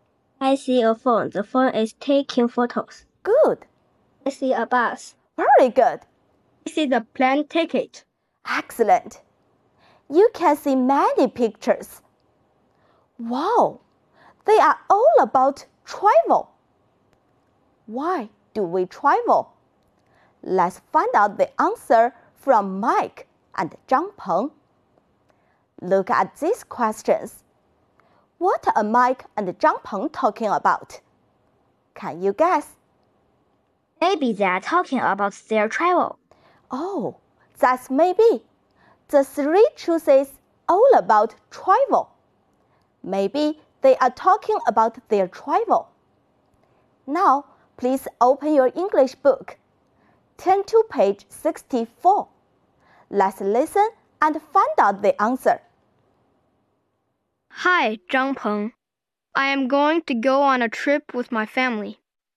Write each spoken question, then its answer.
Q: What are Mike and Zhang Peng talking about?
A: Family trip.